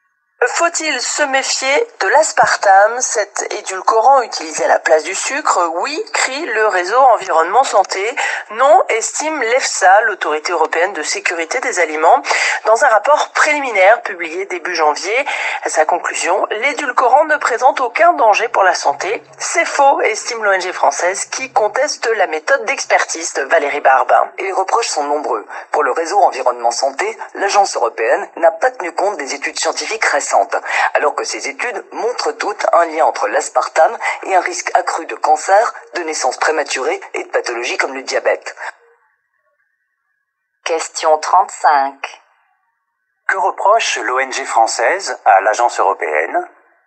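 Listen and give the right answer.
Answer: De ne pas avoir tenu compte des études scientifiques récentes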